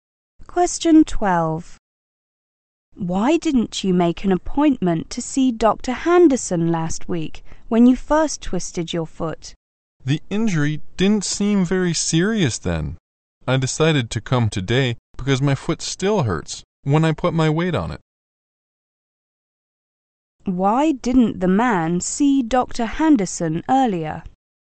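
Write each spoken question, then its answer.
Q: Why didn't the man see Dr. Henderson earlier?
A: The injury didn't seem serious then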